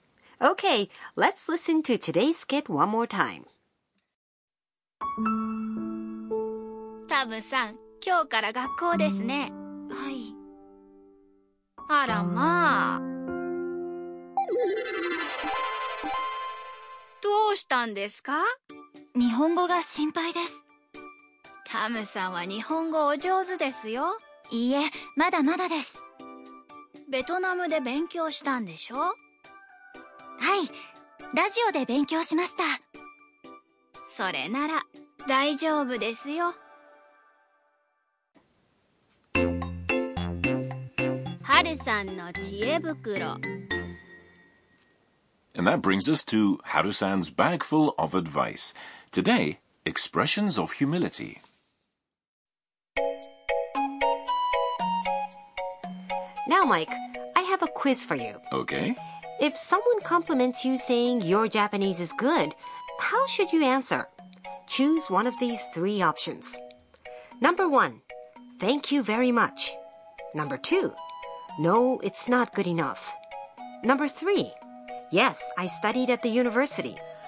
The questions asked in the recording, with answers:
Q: If someone compliments you saying your Japanese is good, how should you answer?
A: most Japanese people would answer, no, it's not good enough, or iie, mada mada desu, in cases like this.